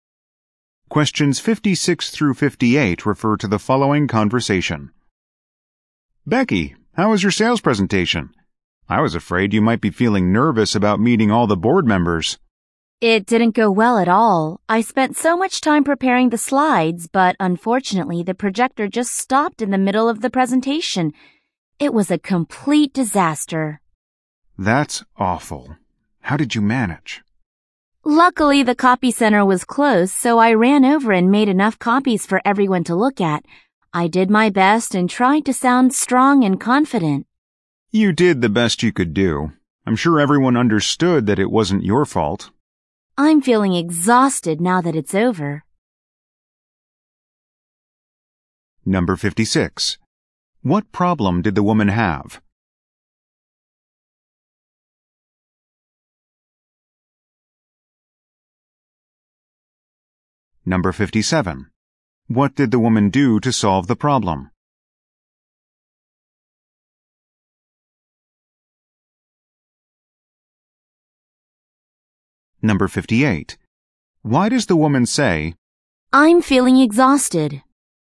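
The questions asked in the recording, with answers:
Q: What problem did the woman have?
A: The projector stopped working during her presentation

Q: What did the woman do to solve the problem?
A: Made copies for everyone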